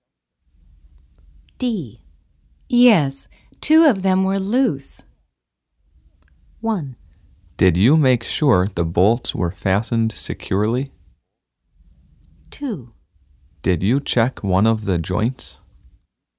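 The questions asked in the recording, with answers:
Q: Yes, two of them were loose.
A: 1: Did you make sure the bolts were fastened securely?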